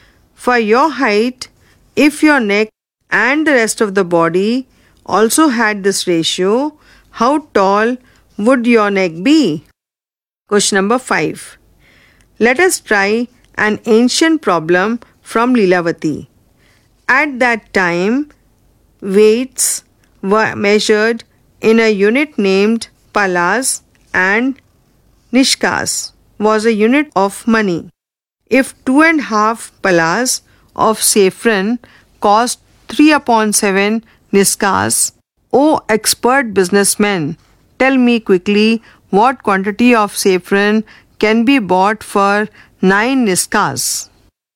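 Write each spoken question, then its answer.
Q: If 2.5 palas of saffron cost 3/7 nishkas, O expert businessman, tell me quickly what quantity of saffron can be bought for 9 nishkas.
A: 52.5 palas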